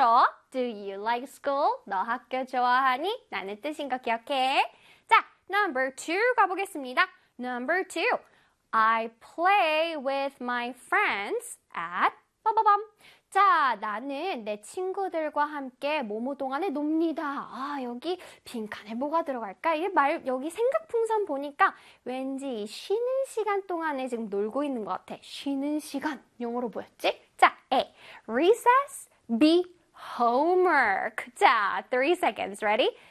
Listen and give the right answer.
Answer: 쉬는 시간, break time이랑 같은 뜻을 갖고 있는 바로 단어는 recess였습니다.